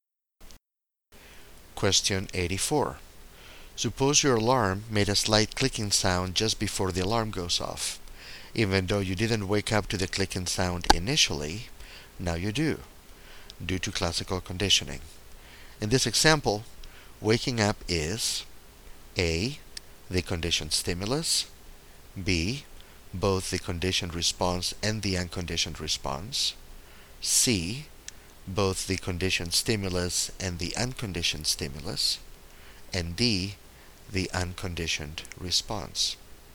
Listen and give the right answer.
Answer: So waking up is B, both the conditioned response and the unconditioned response.